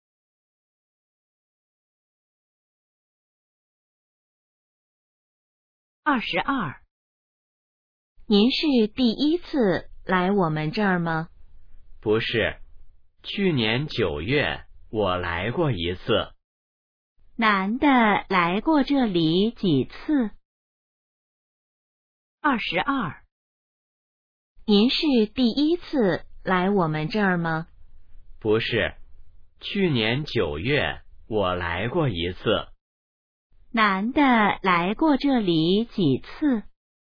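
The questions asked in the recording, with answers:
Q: 男的来过这里几次?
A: 一次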